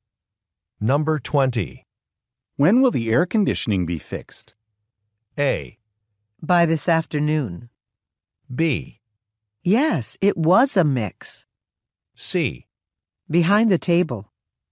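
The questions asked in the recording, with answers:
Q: When will the air conditioning be fixed?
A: A: By this afternoon.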